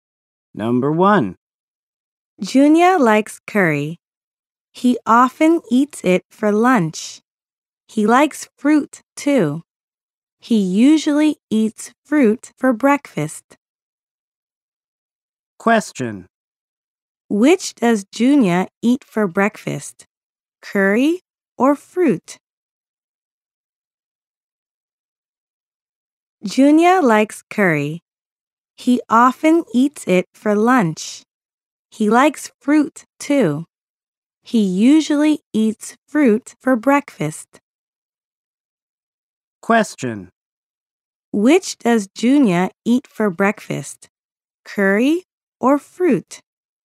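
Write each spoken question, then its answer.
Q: Which does Junya eat for breakfast?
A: Fruit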